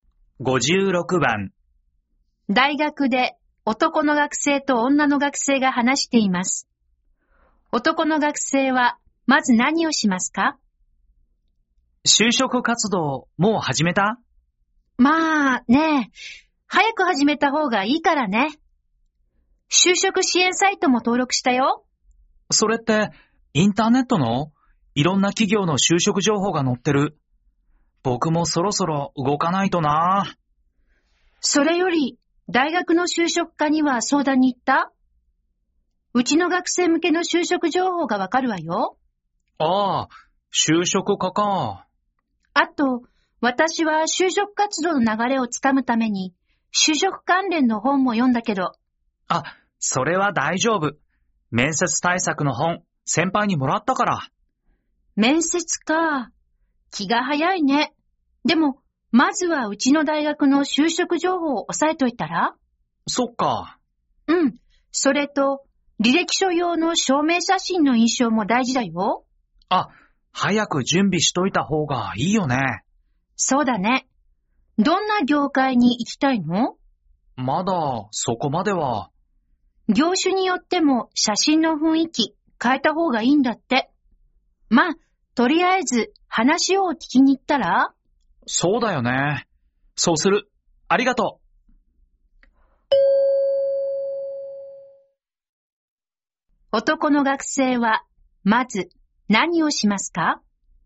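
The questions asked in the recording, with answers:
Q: 男の学生はまず何をしますか?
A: 大学の就職課に相談に行く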